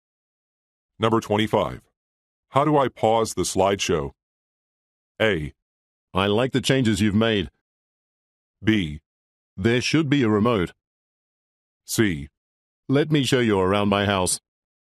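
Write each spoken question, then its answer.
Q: How do I pause the slideshow?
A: B: There should be a remote.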